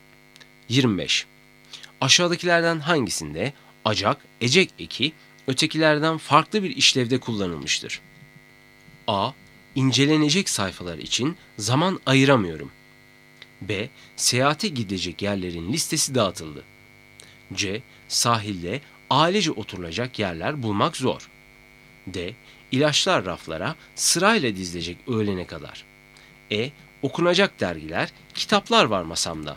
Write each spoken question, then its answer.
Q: Aşağıdakilerden hangisinde acak, ecek eki ötekilerden farklı bir işlevde kullanılmıştır?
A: Doğru cevap D. İlaçlar raflara sırayla dizilecek öğlene kadar.